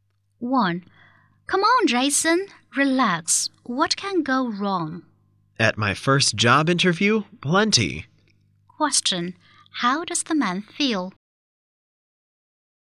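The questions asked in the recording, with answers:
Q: How does the man feel?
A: Nervous about his first job interview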